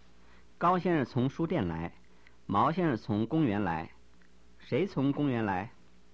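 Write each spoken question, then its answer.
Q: 谁从公园来?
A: 毛先生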